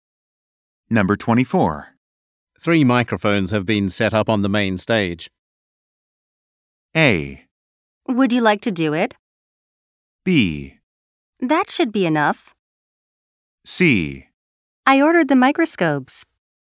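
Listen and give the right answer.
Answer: B: That should be enough.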